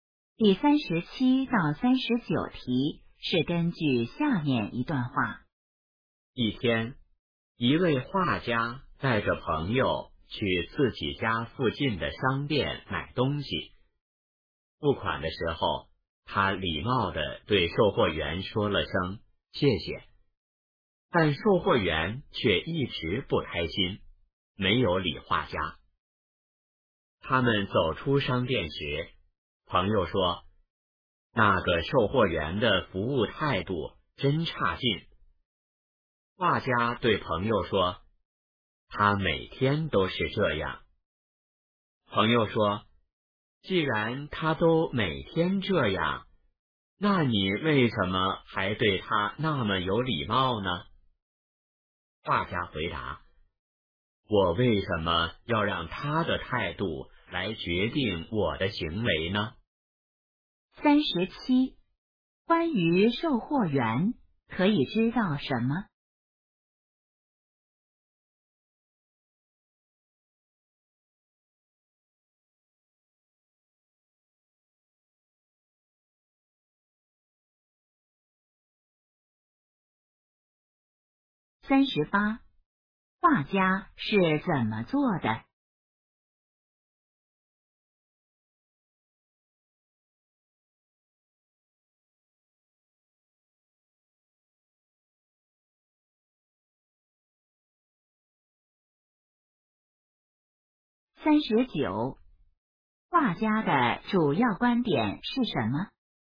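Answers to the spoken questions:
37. 他服务态度很差,每天都不开心
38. 他很有礼貌,对售货员说谢谢
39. 不要让别人的态度决定自己的行为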